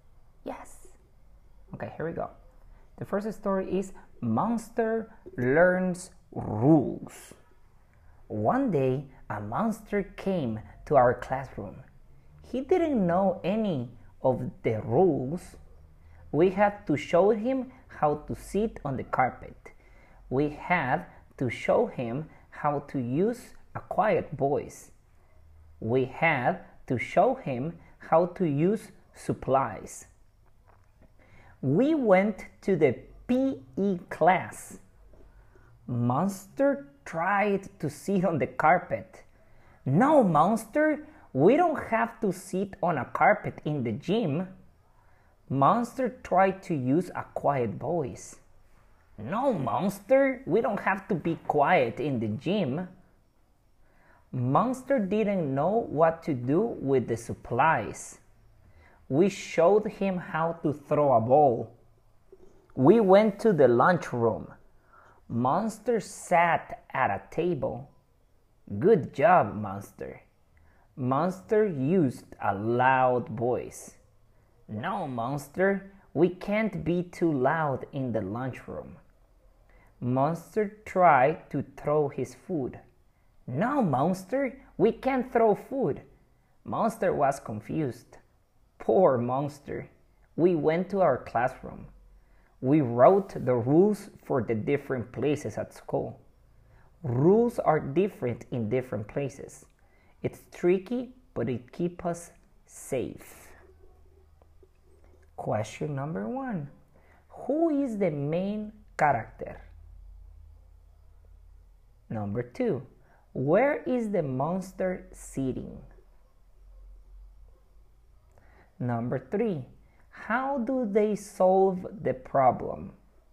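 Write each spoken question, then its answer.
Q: Who is the main character?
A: Monster

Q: how do they solve the problem?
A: They wrote the rules for the different places at school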